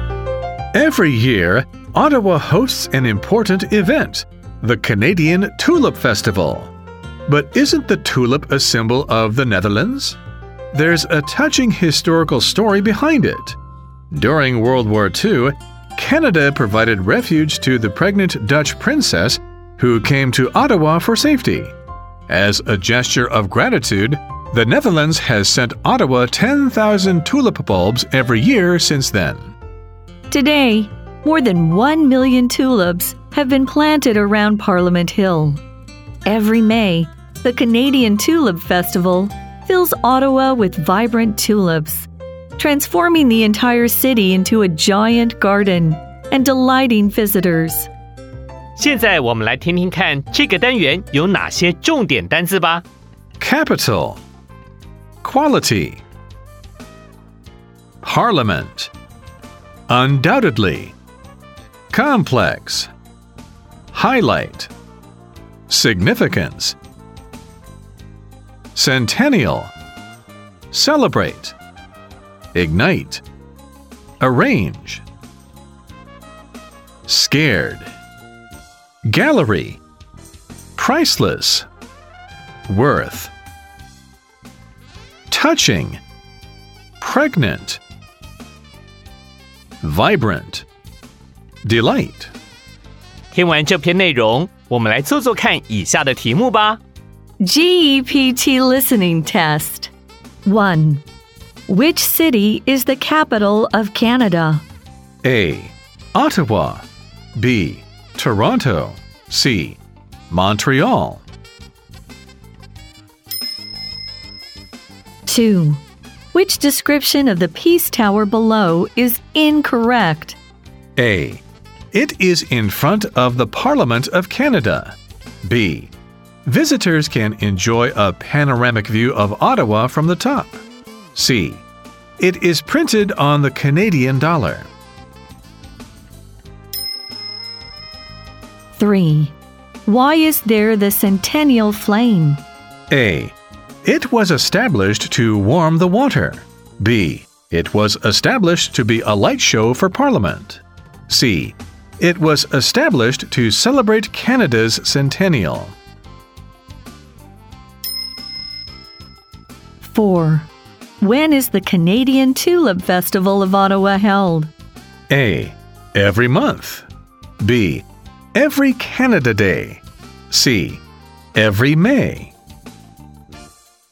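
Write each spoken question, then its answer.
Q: When is the Canadian Tulip Festival of Ottawa held?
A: C: Every May.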